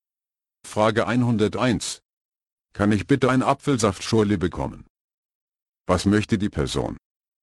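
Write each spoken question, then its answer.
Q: Was möchte die Person?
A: eine Apfelsaftschorle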